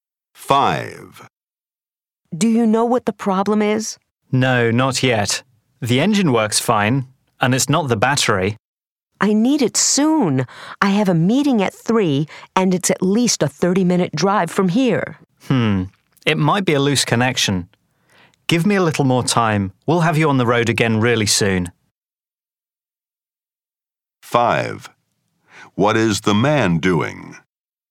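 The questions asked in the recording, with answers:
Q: What is the man doing?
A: Repairing a car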